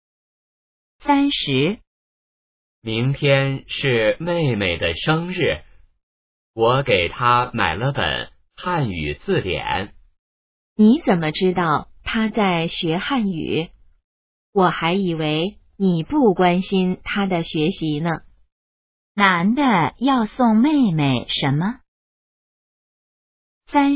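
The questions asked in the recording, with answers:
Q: 男的要送妹妹什么?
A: 汉语字典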